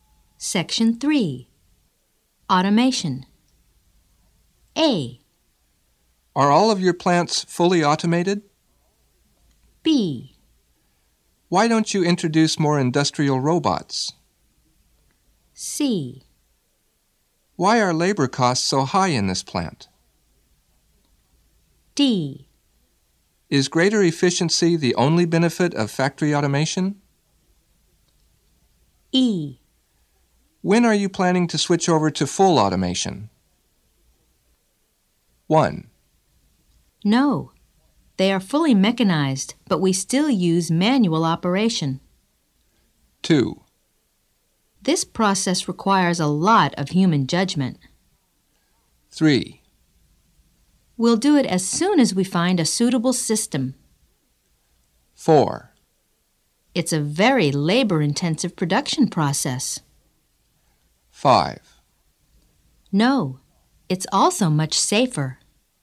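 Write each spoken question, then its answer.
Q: Are all of your plants fully automated?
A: 1: No. They are fully mechanized, but we still use manual operation.

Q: Why don't you introduce more industrial robots?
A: 2: This process requires a lot of human judgment.

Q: Why are labor costs so high in this plant?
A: 4: It's a very labor-intensive production process.

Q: Is greater efficiency the only benefit of factory automation?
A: 5: No, it's also much safer.

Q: When are you planning to switch over to full automation?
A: 3: We'll do it as soon as we find a suitable system.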